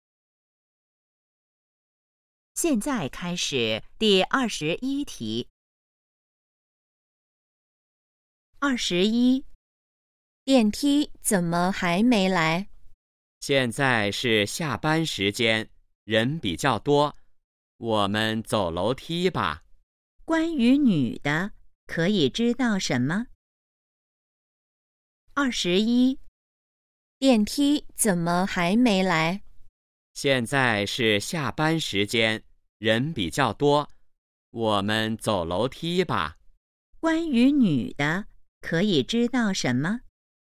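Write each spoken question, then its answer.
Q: 关于女的,可以知道什么?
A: 她想走楼梯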